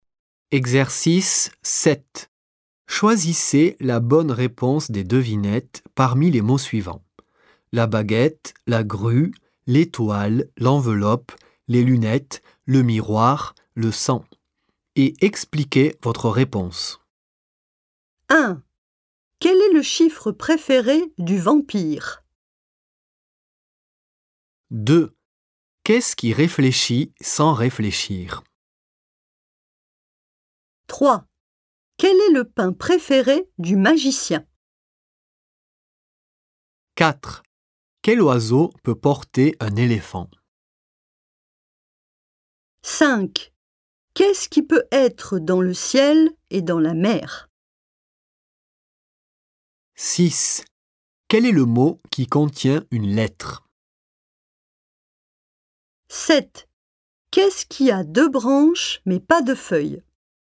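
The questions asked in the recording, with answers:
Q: Quel est le chiffre préféré du vampire?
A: le sang (cent)

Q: Qu'est-ce qui réfléchit sans réfléchir?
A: le miroir

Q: Quel est le pain préféré du magicien?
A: la baguette

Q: Quel oiseau peut porter un éléphant?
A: la grue

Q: Qu'est-ce qui peut être dans le ciel et dans la mer?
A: l'étoile

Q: Quel est le mot qui contient une lettre?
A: l'enveloppe

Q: Qu'est-ce qui a deux branches mais pas de feuilles?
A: les lunettes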